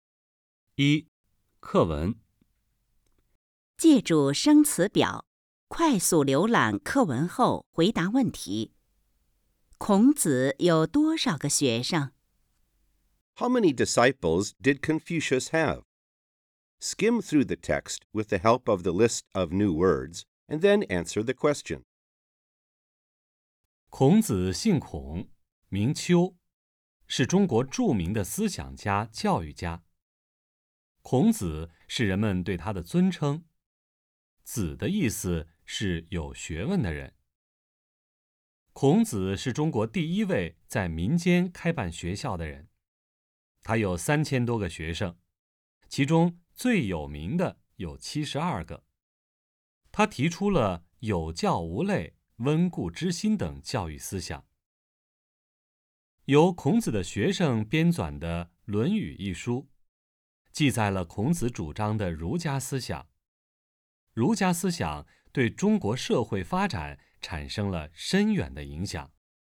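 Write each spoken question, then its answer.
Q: 孔子有多少个学生?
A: 3000多个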